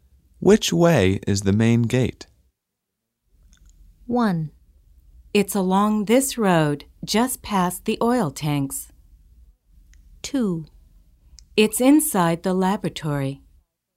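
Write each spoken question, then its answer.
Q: Which way is the main gate?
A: 1: It's along this road, just past the oil tanks.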